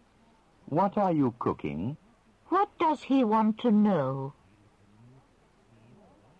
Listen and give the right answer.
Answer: He wants to know what you are cooking.